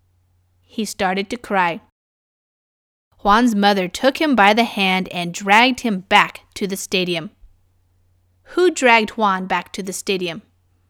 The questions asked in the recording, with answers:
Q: Who dragged Juan back to the stadium?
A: His mother.